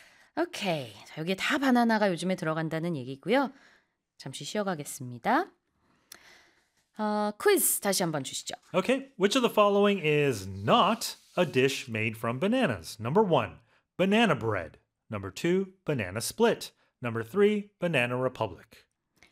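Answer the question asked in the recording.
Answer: 3: banana republic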